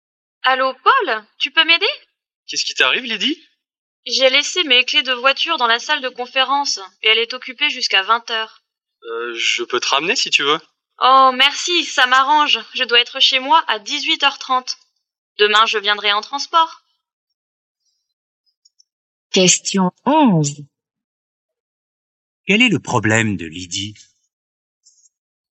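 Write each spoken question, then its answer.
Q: Quel est le problème de Lydie?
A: Ses clés de voiture sont dans une salle occupée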